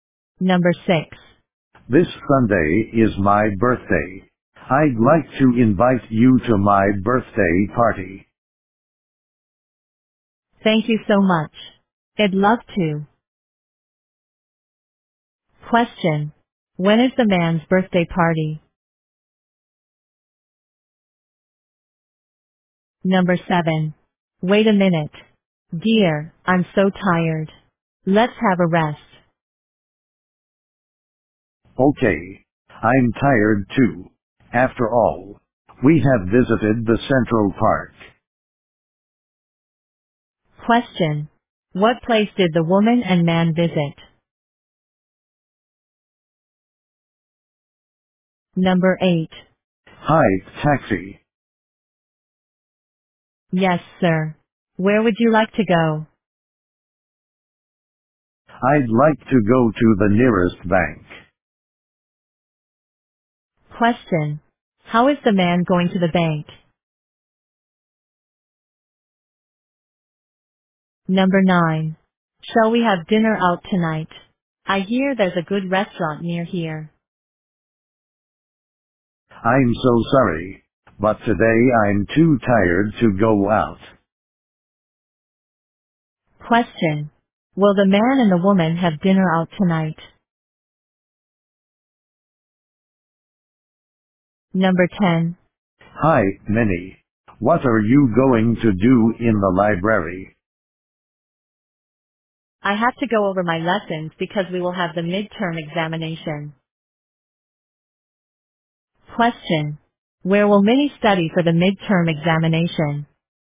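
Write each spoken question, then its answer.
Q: When is the man's birthday party?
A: This Sunday

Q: What place did the woman and man visit?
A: The Central Park

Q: How is the man going to the bank?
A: By taxi

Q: Will the man and the woman have dinner out tonight?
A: No, they won't

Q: Where will Minnie study for the midterm examination?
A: In the library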